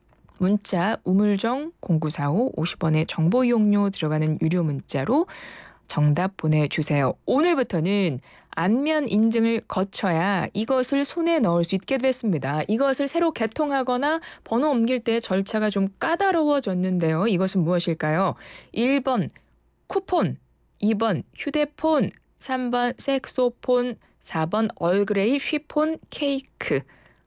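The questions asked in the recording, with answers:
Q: 이것은 무엇일까요? 1번 쿠폰, 2번 휴대폰, 3번 색소폰, 4번 얼그레이 쉬폰 케이크.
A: 2: 휴대폰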